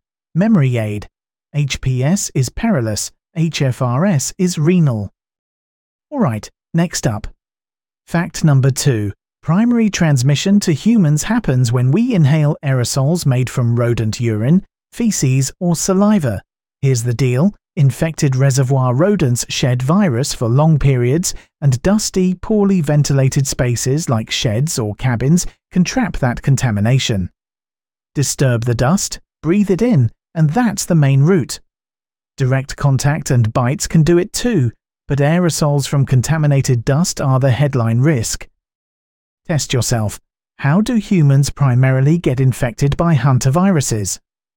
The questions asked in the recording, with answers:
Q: Test yourself. How do humans primarily get infected by hantaviruses?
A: Correct answer. Inhalation of aerosols from rodent excreta.